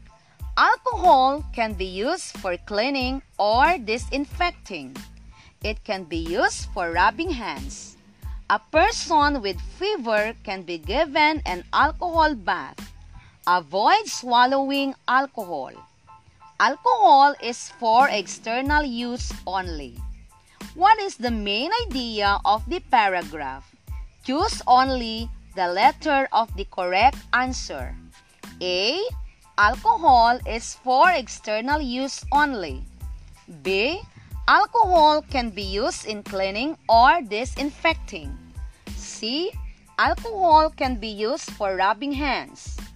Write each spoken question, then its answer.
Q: What is the main idea of the paragraph?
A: The answer is letter A.